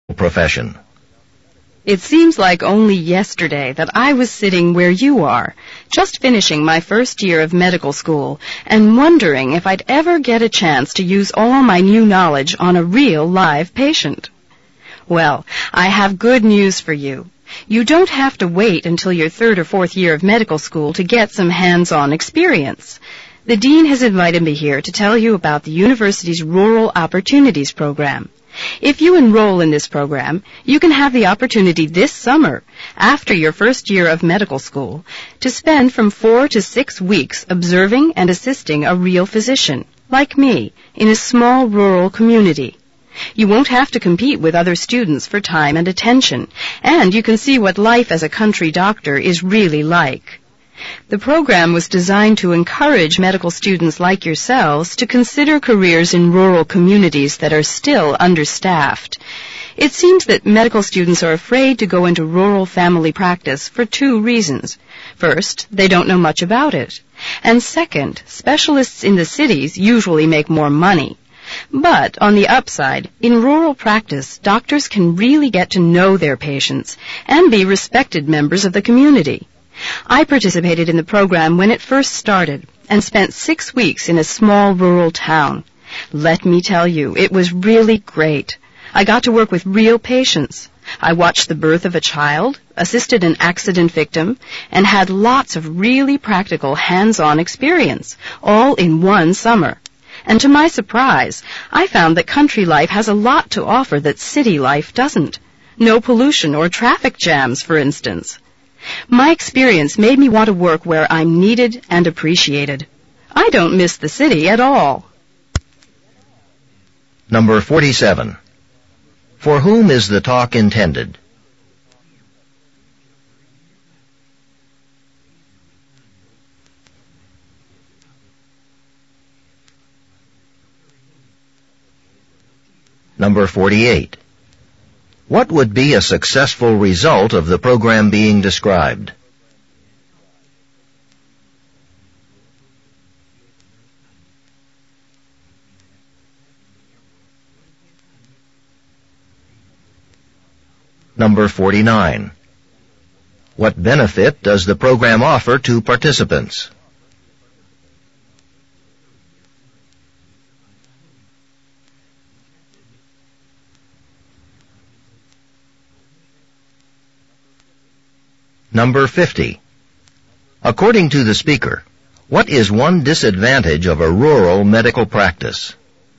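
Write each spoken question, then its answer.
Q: For whom is the talk intended?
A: First-year medical students

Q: What would be a successful result of the program being described?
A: More medical students choosing careers in understaffed rural communities

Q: What benefit does the program offer to participants?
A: Hands-on experience observing and assisting a rural physician the summer after their first year

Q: According to the speaker, what is one disadvantage of a rural medical practice?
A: Doctors usually earn less than city specialists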